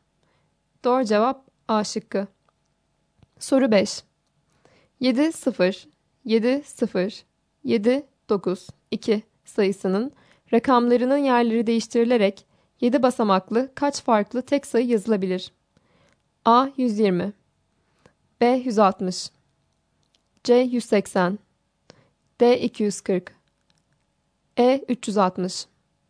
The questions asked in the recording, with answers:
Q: 7, 0, 7, 0, 7, 9, 2 sayısının rakamlarının yerleri değiştirilerek 7 basamaklı kaç farklı tek sayı yazılabilir?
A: Doğru cevap B şıkkı.